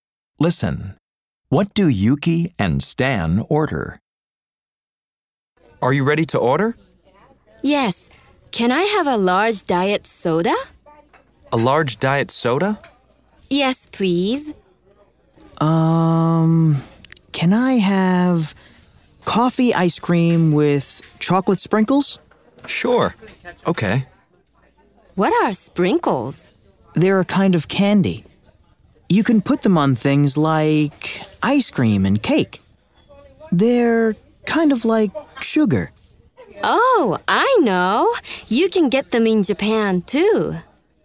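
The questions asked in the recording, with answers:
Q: What do Yuki and Stan order?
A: A large diet soda and coffee ice cream with chocolate sprinkles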